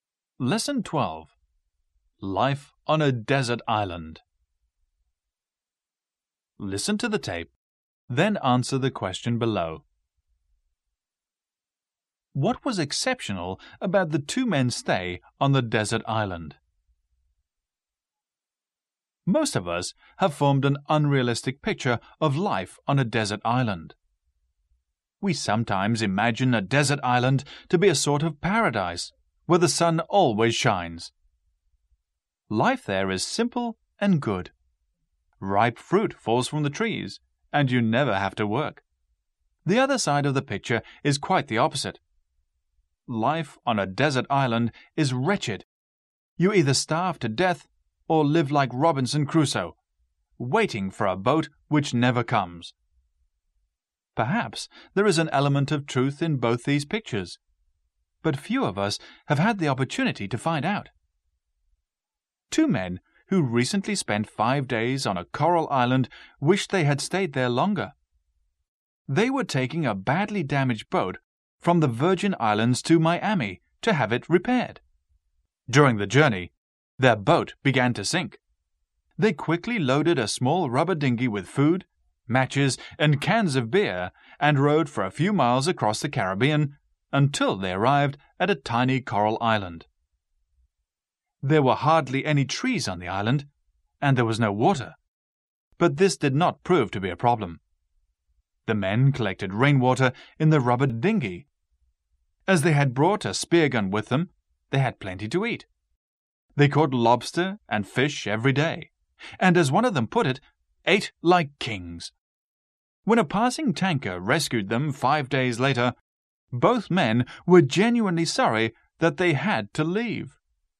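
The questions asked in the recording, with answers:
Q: What was exceptional about the two men's stay on the desert island?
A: They enjoyed it and wished they had stayed longer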